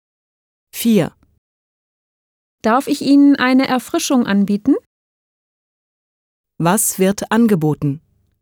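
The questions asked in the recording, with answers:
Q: Was wird angeboten?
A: Eine Erfrischung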